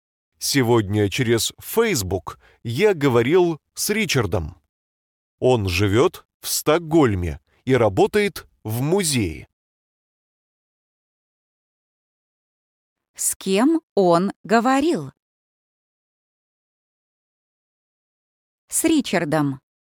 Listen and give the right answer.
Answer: с Ричардом.